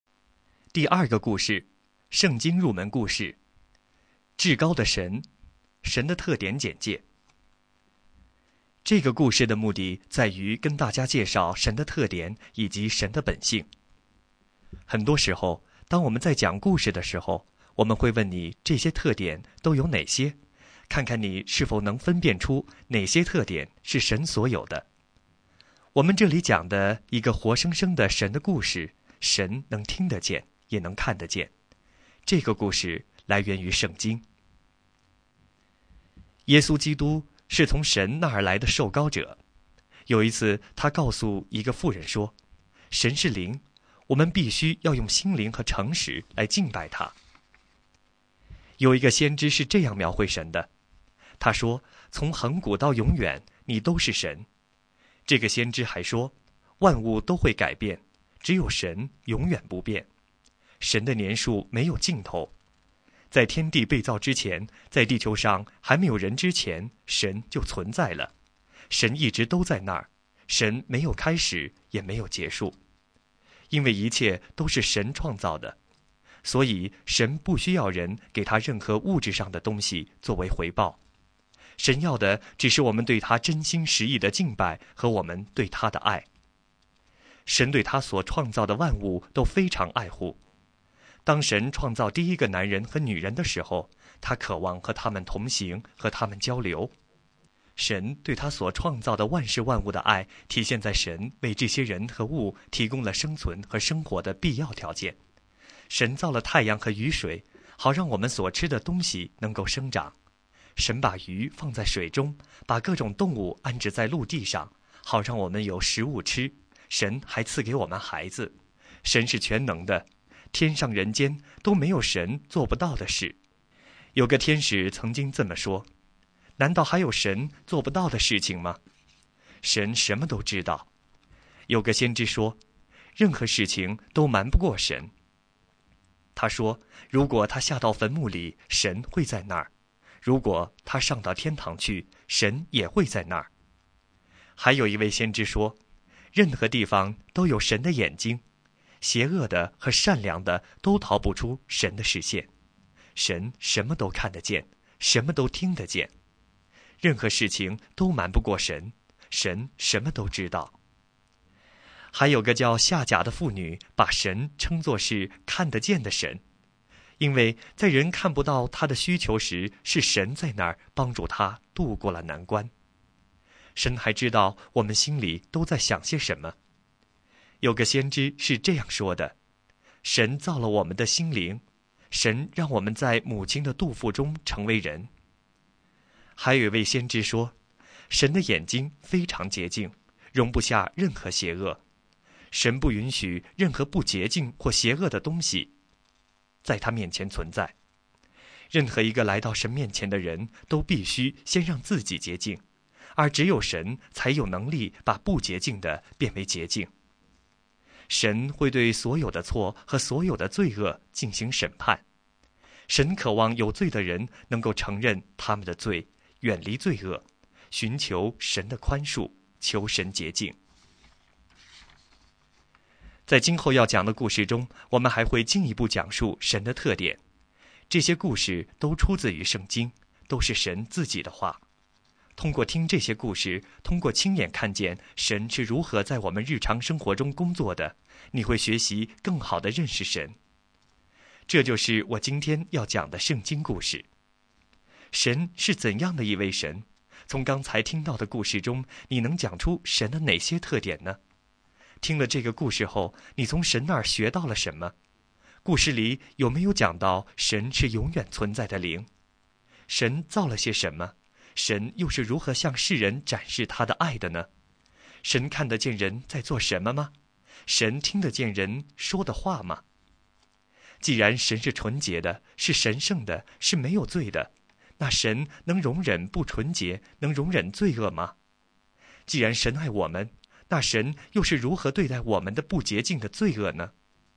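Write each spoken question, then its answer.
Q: 故事里有没有讲到神是永远存在的灵?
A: 有,神是灵,没有开始也没有结束

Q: 神造了些什么?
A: 万物:太阳、雨水、鱼、各种动物和人

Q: 神又是如何向世人展示他的爱的呢?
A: 为人和万物提供生存所需,如太阳、雨水、食物,还赐给我们孩子

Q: 神看得见人在做什么吗?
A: 看得见

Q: 神听得见人说的话吗?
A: 听得见

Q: 既然神是纯洁的,是神圣的,是没有罪的,那神能容忍不纯洁,能容忍罪恶吗?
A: 不能

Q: 既然神爱我们,那神又是如何对待我们的不洁净的罪恶呢?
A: 神会审判罪恶,但渴望人承认罪、远离罪恶、寻求宽恕,并使人洁净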